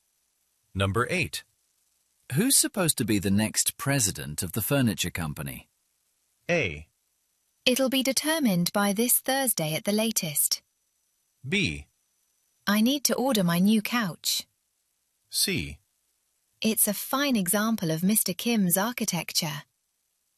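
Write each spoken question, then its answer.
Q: Who's supposed to be the next president of the furniture company?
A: A: It'll be determined by this Thursday at the latest.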